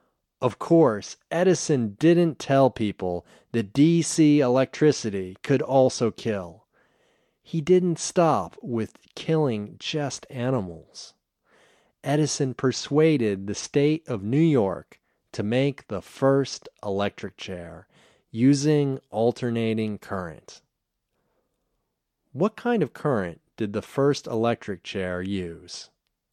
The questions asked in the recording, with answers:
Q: What kind of current did the first electric chair use?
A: The first electric chair used alternating current.